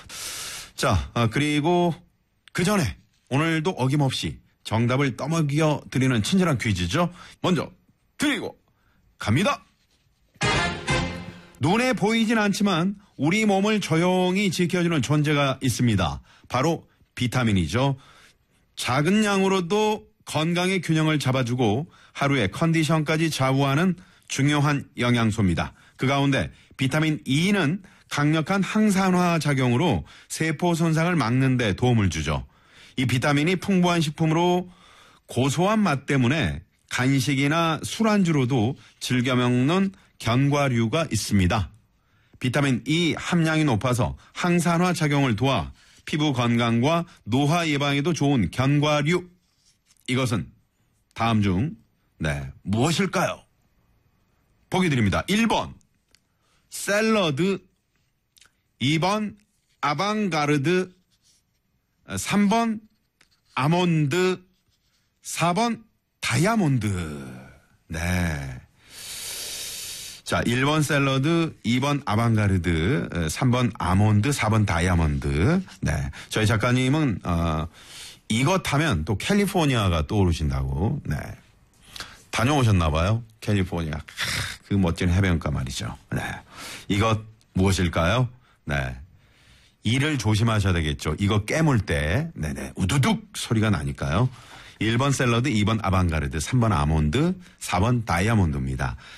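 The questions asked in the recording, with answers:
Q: 비타민 E 함량이 높아서 항산화 작용을 도와 피부 건강과 노화 예방에도 좋은 견과류. 이것은 다음 중 네, 무엇일까요?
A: 3: 아몬드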